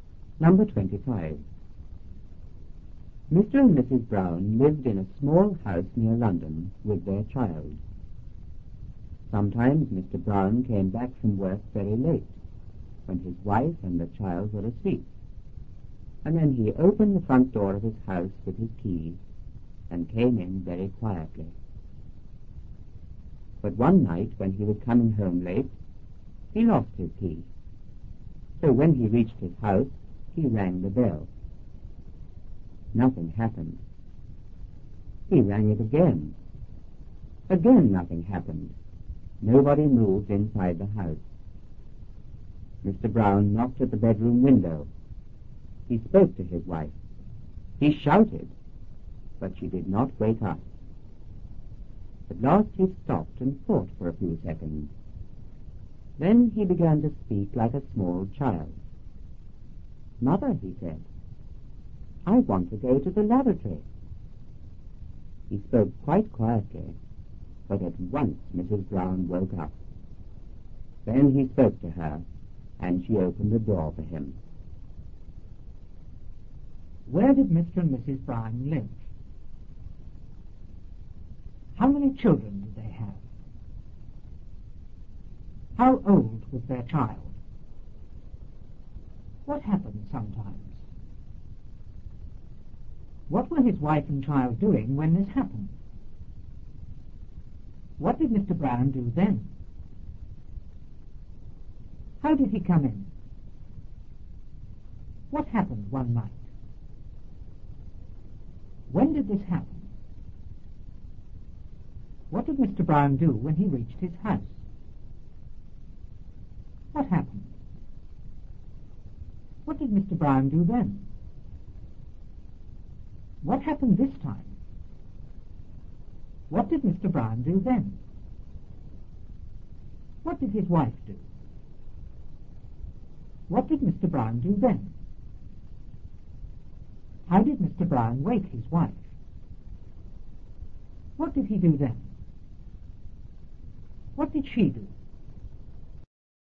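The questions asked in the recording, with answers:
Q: Where did Mr. and Mrs. Brown live?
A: In a small house near London

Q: How many children did they have?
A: One

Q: What happened sometimes?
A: Mr. Brown came back from work very late

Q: What were his wife and child doing when this happened?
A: They were asleep

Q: How did he come in?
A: Very quietly, opening the front door with his key

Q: What happened one night?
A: He lost his key

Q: When did this happen?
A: When he was coming home late

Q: Brown do when he reached his house?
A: He rang the bell

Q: What did his wife do?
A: She did not wake up

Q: How did Mr. Brown wake his wife?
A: He spoke like a small child

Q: What did she do?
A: She opened the door for him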